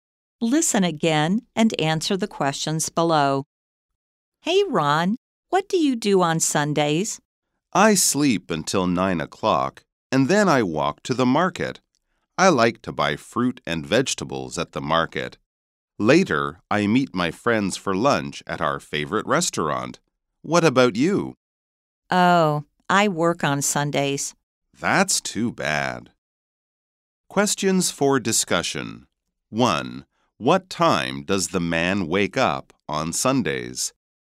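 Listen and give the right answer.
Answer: At 9 o'clock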